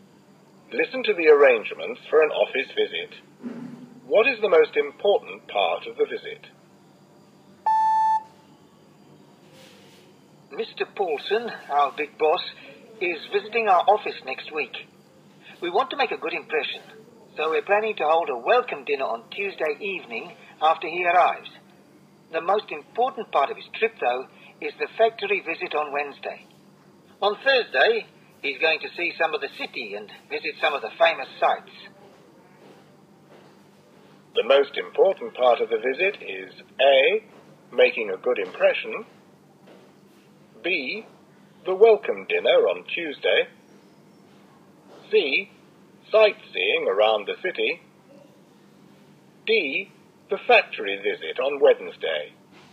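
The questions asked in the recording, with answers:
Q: What is the most important part of the visit?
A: D: the factory visit on Wednesday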